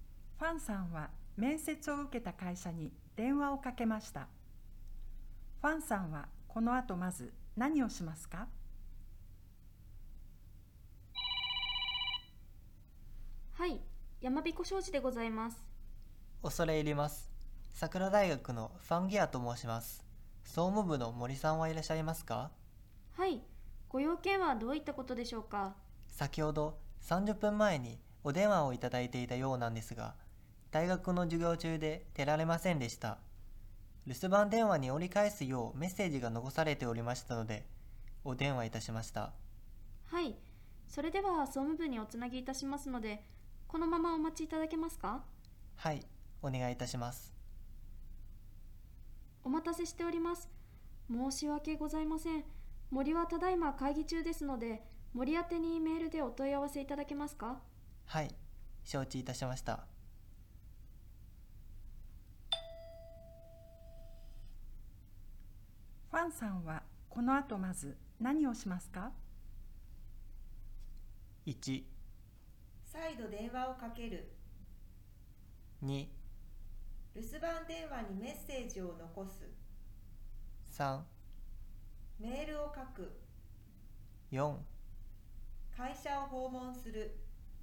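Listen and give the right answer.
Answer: 3: メールを書く。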